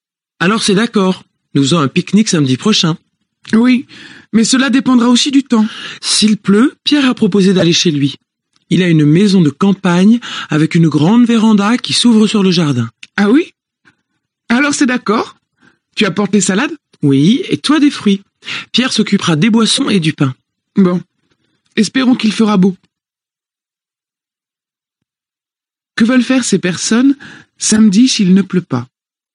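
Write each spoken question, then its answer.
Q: Que veulent faire ces personnes samedi s'il ne pleut pas?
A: Faire un pique-nique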